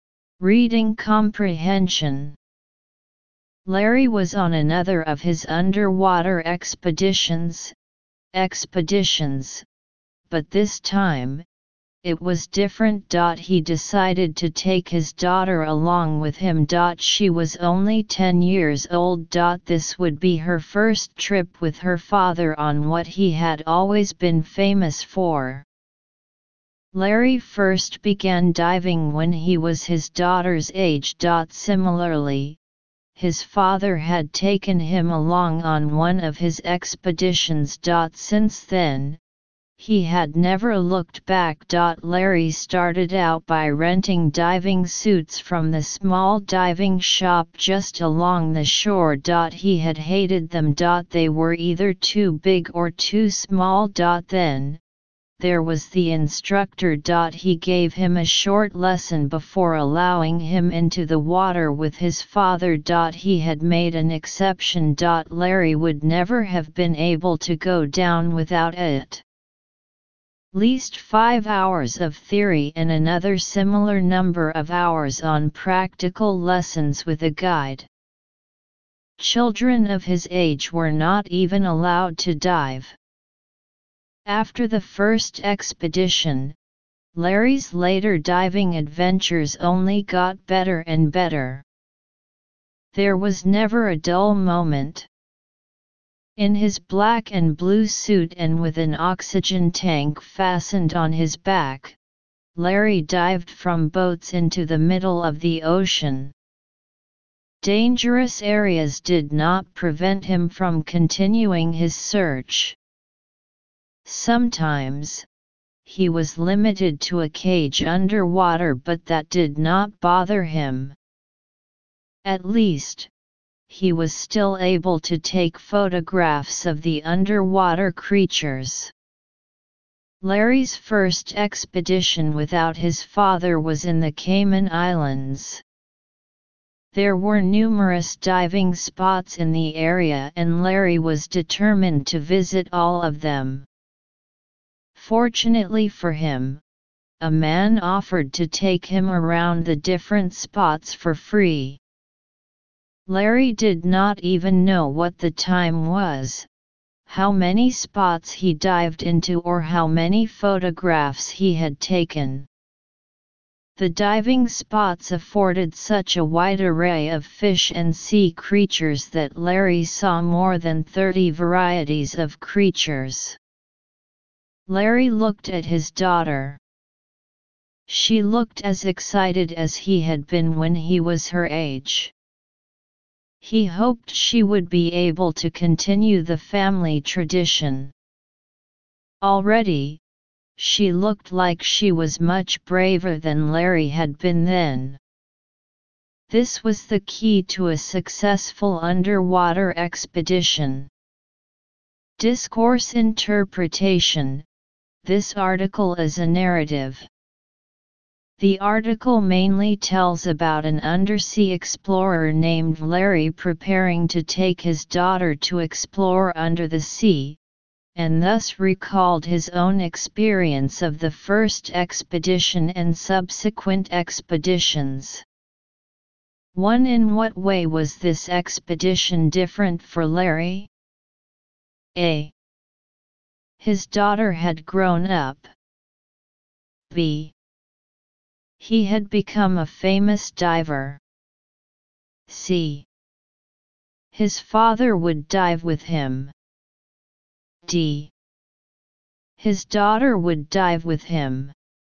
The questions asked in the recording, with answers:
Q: In what way was this expedition different for Larry?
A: Choose D